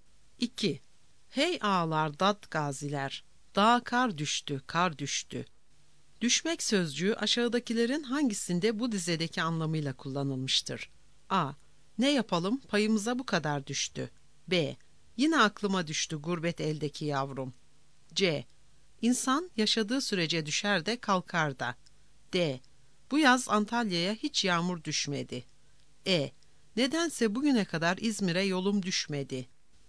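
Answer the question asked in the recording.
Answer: D: Bu yaz Antalya'ya hiç yağmur düşmedi.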